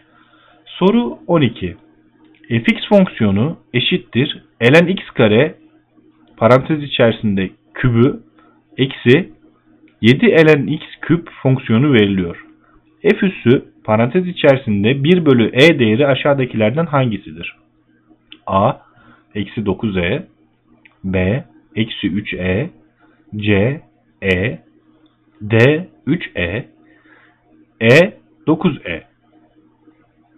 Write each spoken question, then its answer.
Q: F üssü parantez içerisinde 1 bölü e değeri aşağıdakilerden hangisidir?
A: Doğru yanıt D 3e.